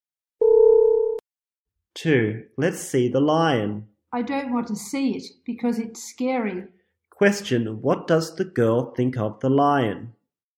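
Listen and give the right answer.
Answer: It's scary.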